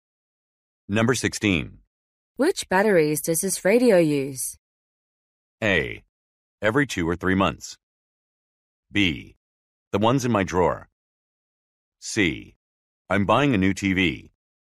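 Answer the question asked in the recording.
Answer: B: The ones in my drawer.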